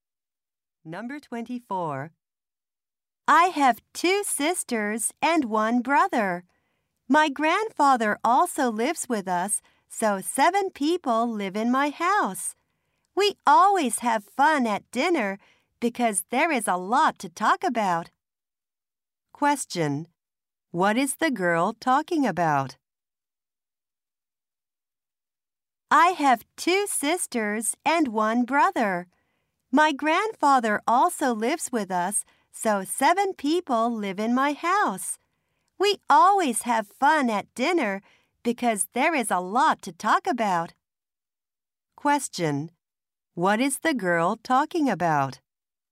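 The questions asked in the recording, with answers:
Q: What is the girl talking about?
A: Her family.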